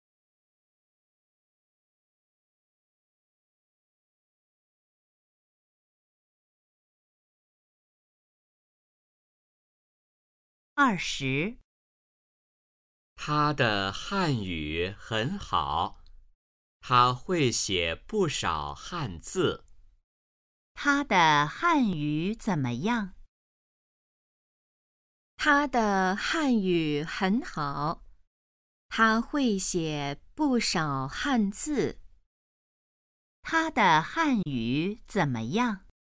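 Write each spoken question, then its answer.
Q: 他的汉语怎么样?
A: 很好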